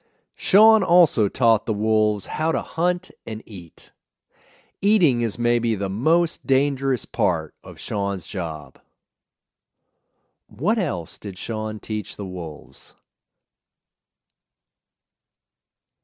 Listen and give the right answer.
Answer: He also taught the wolves how to hunt and eat.